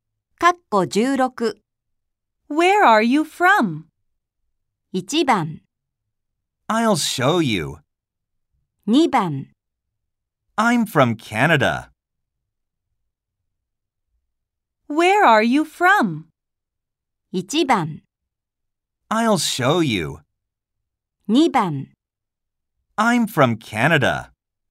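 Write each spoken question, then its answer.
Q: Where are you from?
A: 2: I'm from Canada.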